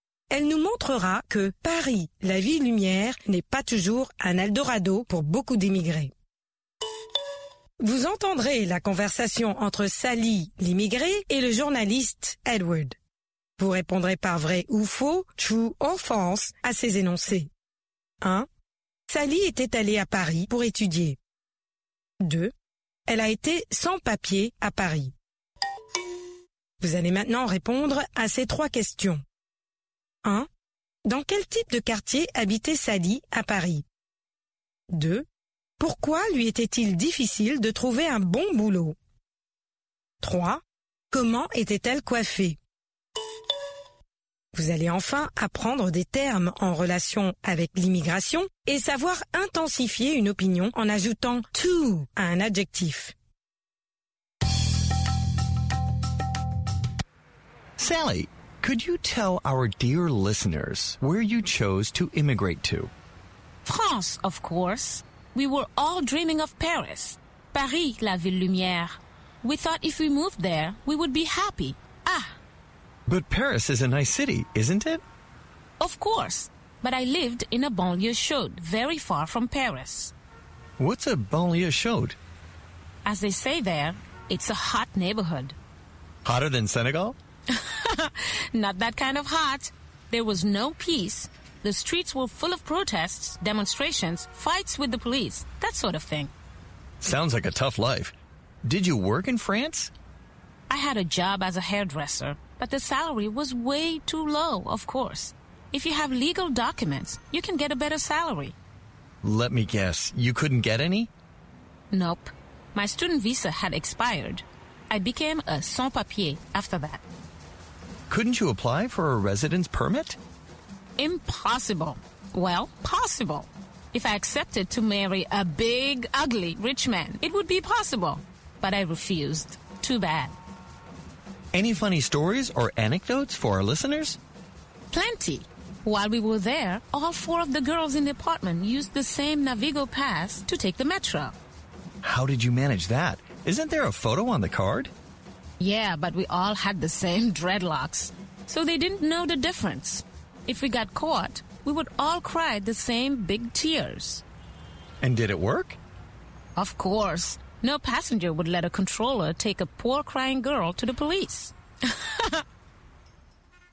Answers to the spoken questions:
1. L'énoncé 1 est vrai. Sally était allée à Paris pour étudier.
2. L'énoncé 2 est vrai. Elle a été sans papier à Paris.
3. Dans une banlieue chaude.
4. Elle était sans papier.
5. En dreadlocks.